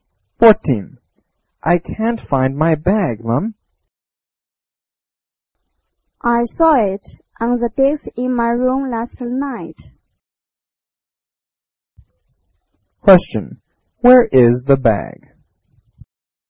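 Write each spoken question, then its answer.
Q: Where is the bag?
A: On the desk in the room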